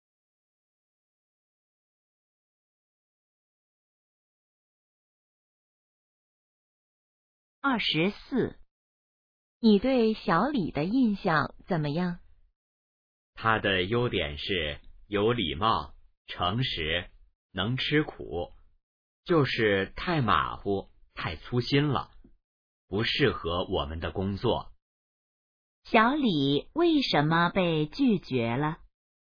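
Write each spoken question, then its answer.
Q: 小李为什么被拒绝了?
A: 太马虎、太粗心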